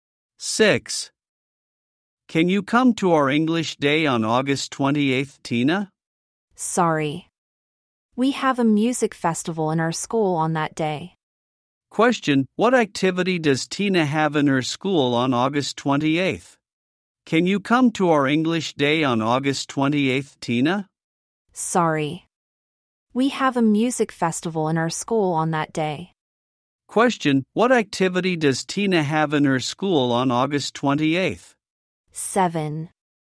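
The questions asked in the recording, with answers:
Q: what activity does Tina have in her school on August 28th?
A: A music festival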